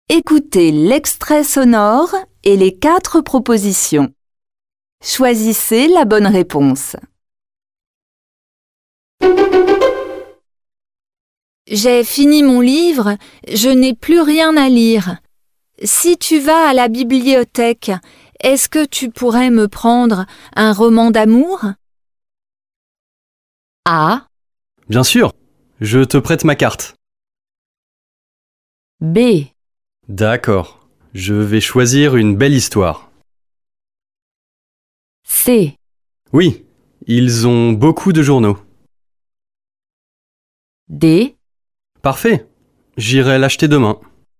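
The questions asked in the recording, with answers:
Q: Choisissez la bonne réponse.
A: B: D'accord, je vais choisir une belle histoire.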